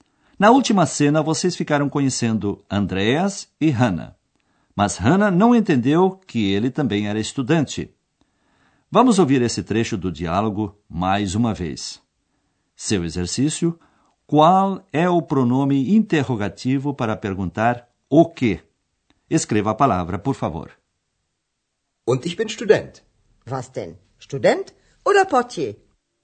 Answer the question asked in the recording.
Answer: A terceira era o pronome interrogativo was, o que?